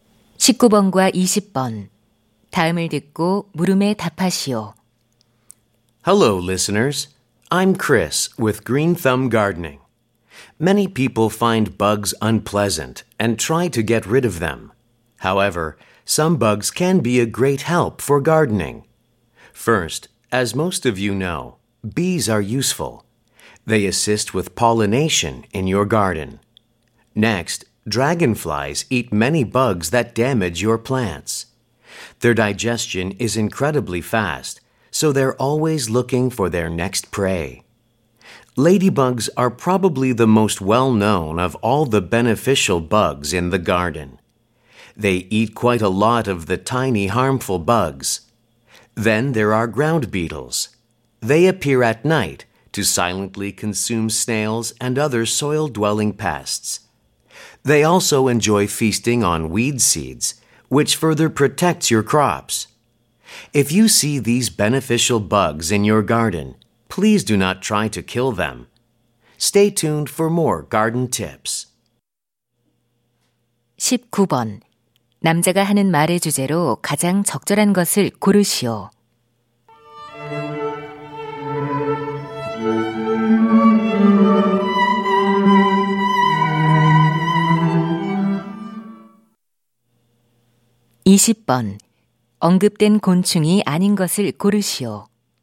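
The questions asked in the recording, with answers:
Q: 남자가 하는 말의 주제로 가장 적절한 것을 고르시오.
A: 정원 가꾸기에 도움이 되는 곤충들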